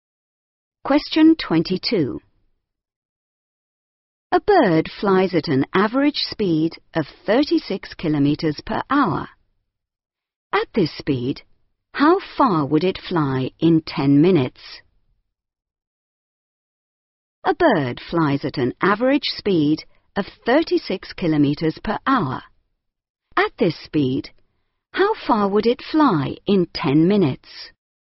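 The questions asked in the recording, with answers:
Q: At this speed, how far would it fly in 10 minutes?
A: 6 kilometres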